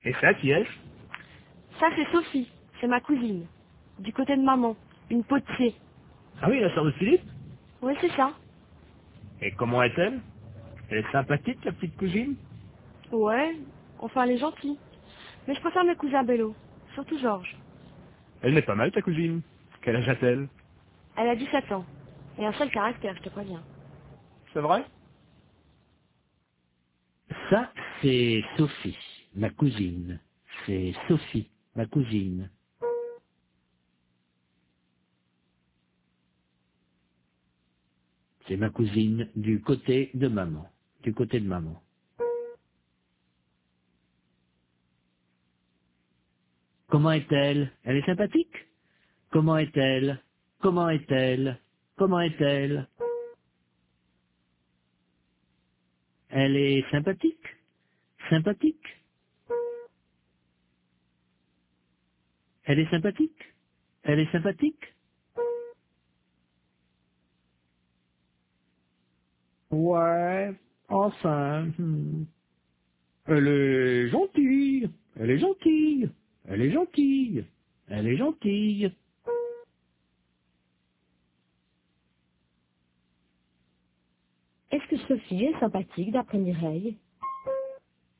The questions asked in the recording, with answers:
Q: Est-ce que Sophie est sympathique d'après Mireille ?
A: Oui, enfin.